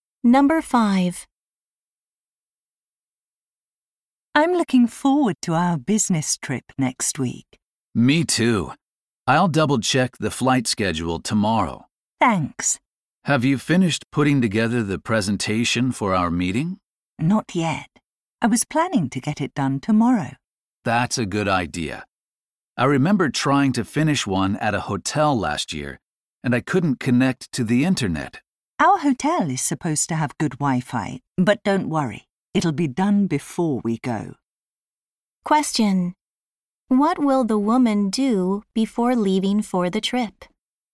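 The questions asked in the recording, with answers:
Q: What will the woman do before leaving for the trip?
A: Finish the presentation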